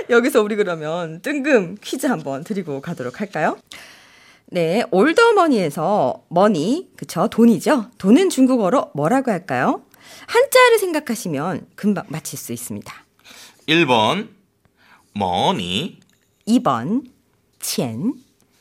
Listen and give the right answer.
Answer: 정답은 2번 첸입니다.